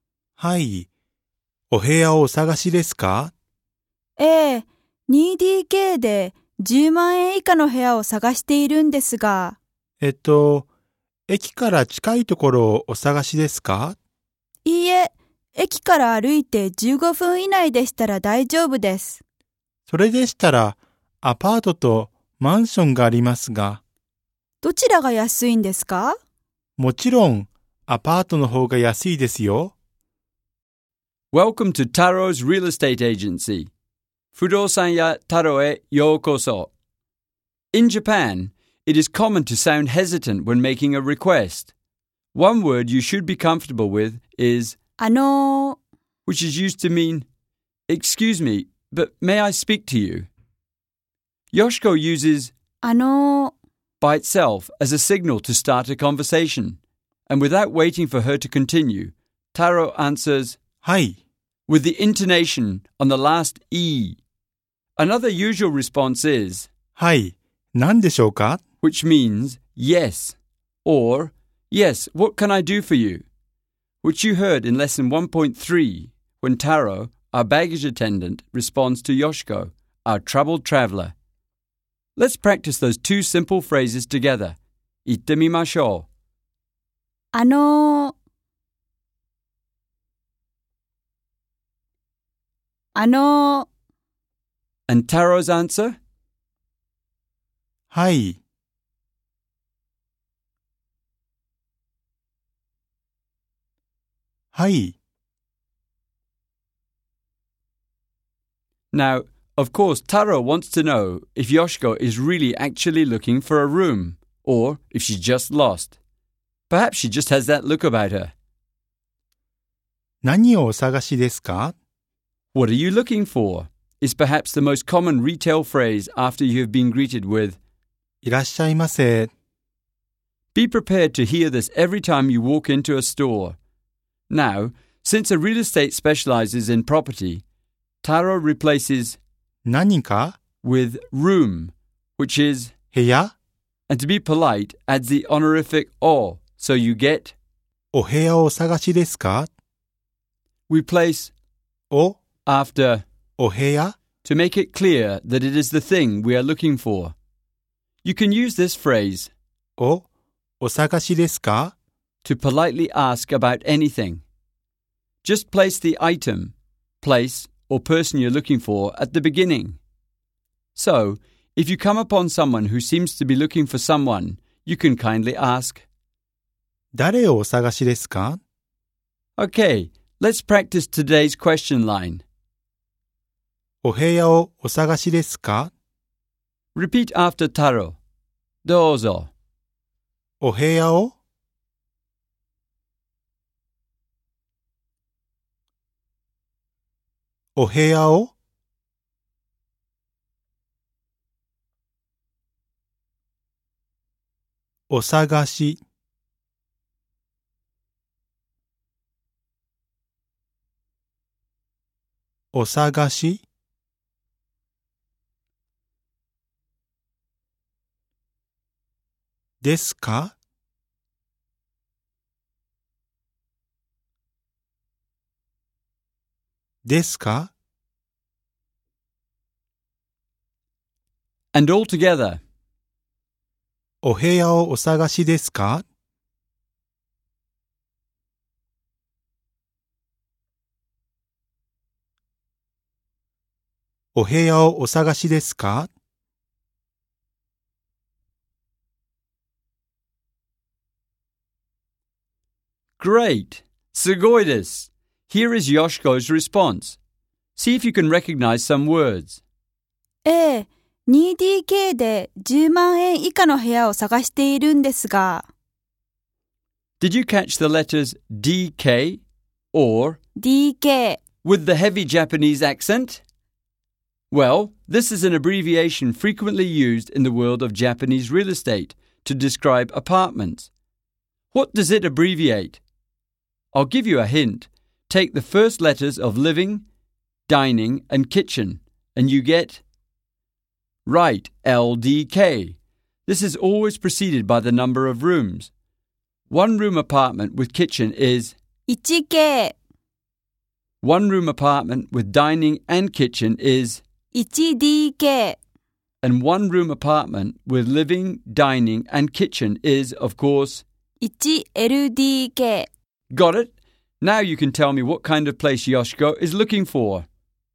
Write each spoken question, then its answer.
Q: Now you can tell me what kind of place Yoshiko is looking for.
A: That's right, a two-bedroom apartment with dining and kitchen.